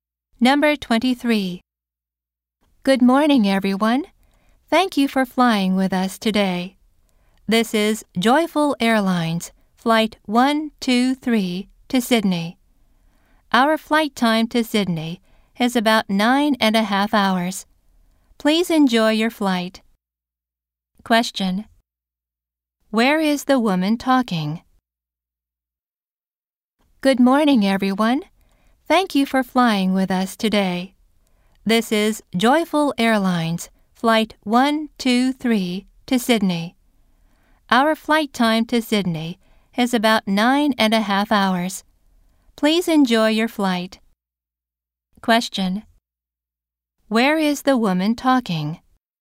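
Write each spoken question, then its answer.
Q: Where is the woman talking?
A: On an airplane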